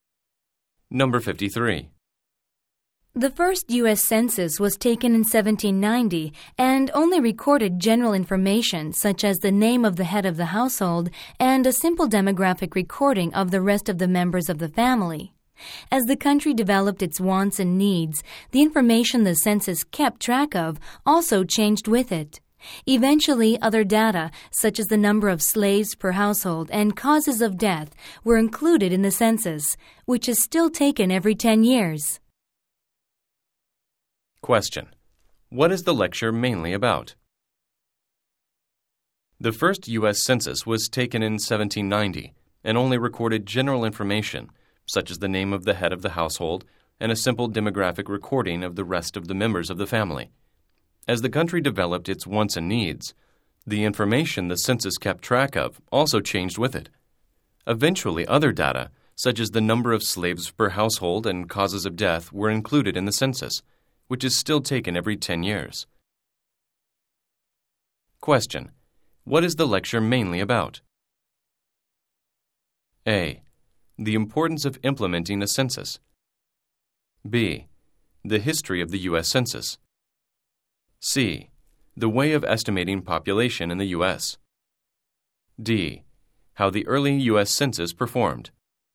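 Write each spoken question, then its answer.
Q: What is the lecture mainly about?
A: B: The history of the U.S. Census.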